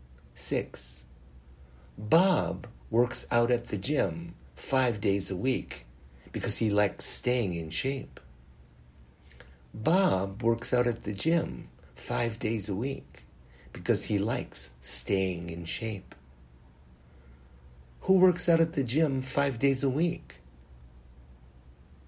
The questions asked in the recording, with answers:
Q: Who works out at the gym 5 days a week?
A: Bob works out at the gym 5 days a week.